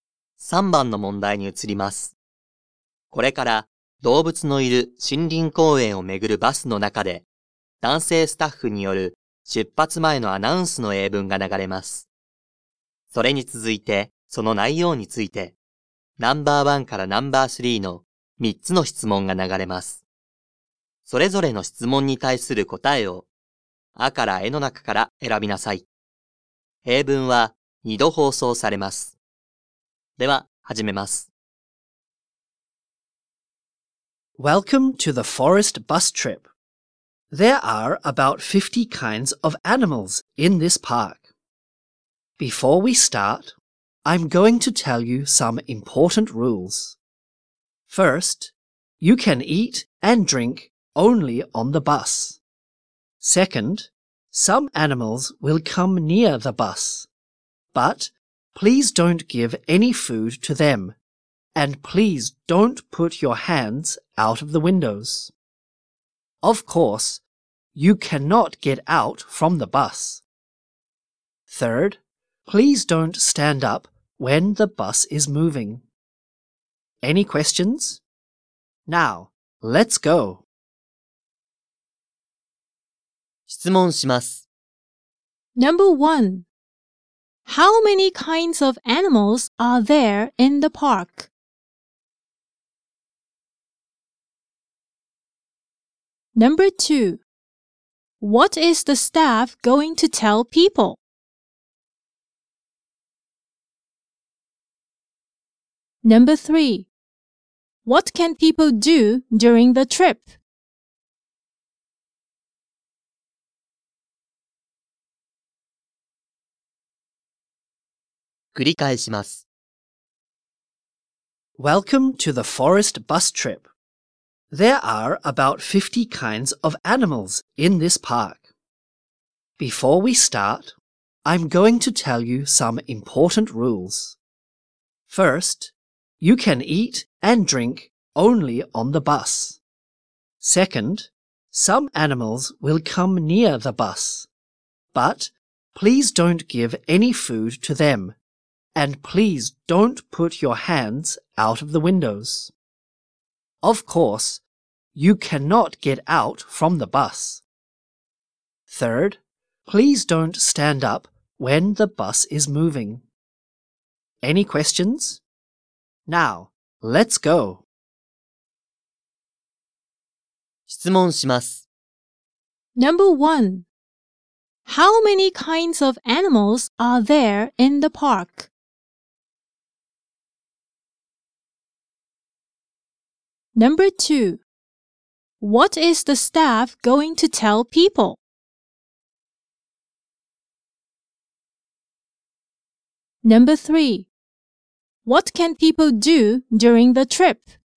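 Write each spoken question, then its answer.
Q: How many kinds of animals are there in the park?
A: About 50 kinds

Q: What is the staff going to tell people?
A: Some important rules

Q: What can people do during the trip?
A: Eat and drink on the bus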